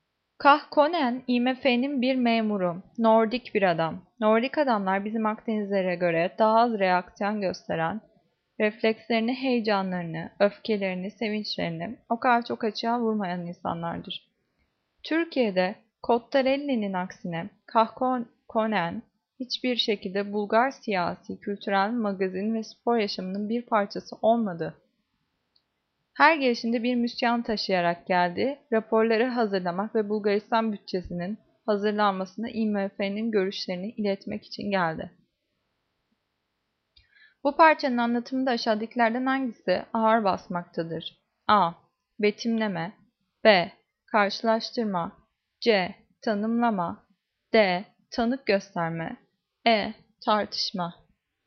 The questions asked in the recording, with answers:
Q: Bu parçanın anlatımında aşağıdakilerden hangisi ağır basmaktadır?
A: Cevap B. Karşılaştırma.